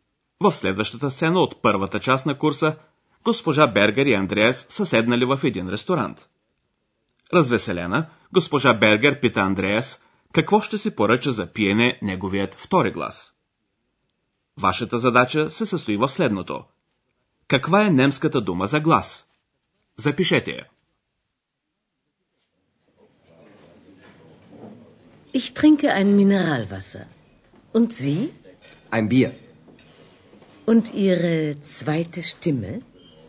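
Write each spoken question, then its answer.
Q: Каква е немската дума за глас?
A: Stimme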